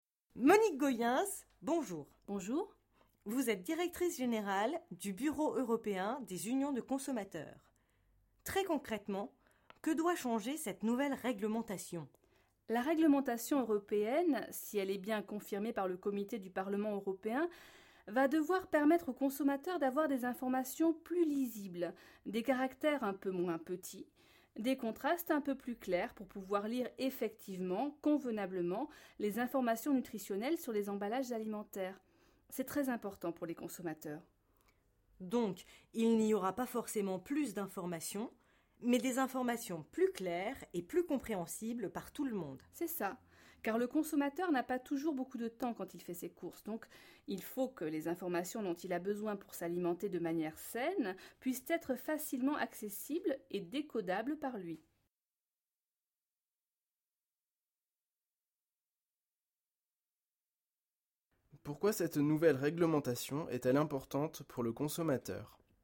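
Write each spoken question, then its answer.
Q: Pourquoi cette nouvelle réglementation est-elle importante pour le consommateur ?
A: Parce que le consommateur a peu de temps en faisant ses courses : les informations nutritionnelles doivent être plus lisibles et faciles à comprendre pour qu'il puisse s'alimenter sainement.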